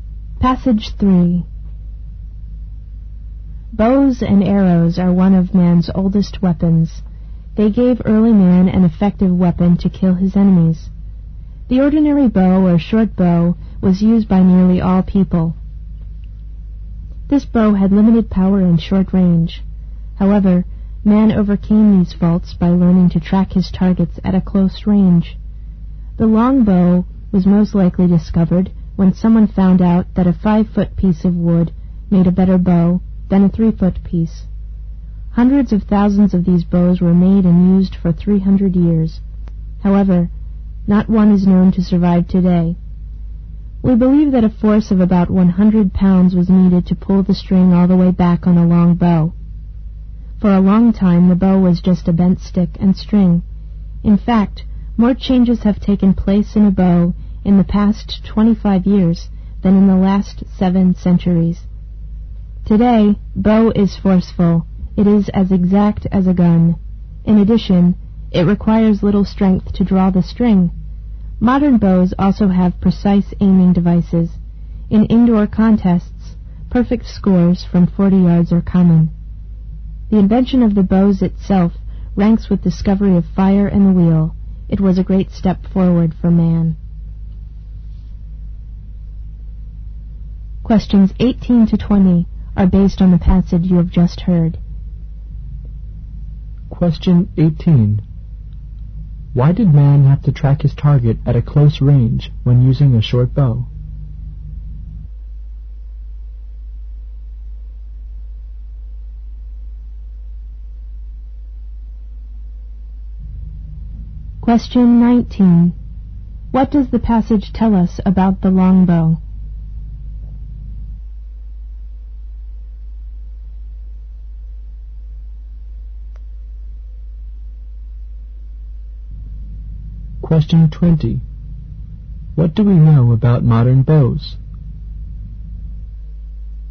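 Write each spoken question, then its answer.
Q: Why did man have to track his target at a close range when using a short bow?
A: The short bow had limited power and short range.

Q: What does the passage tell us about the longbow?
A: It was used for 300 years, but none survives today; it took about 100 pounds of force to draw.

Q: What do we know about modern bows?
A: They are powerful and as accurate as a gun, take little strength to draw, and have precise aiming devices.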